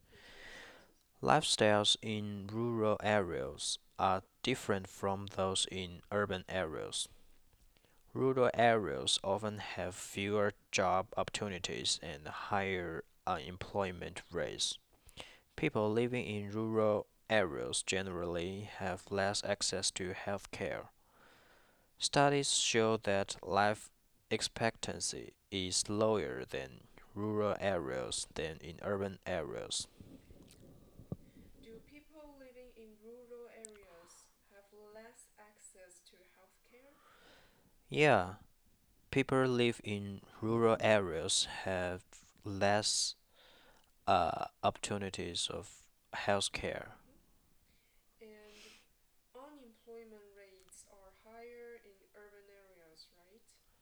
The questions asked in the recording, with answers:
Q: Do people living in rural areas have less access to health care?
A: Yeah, people live in rural areas have less opportunities of health care.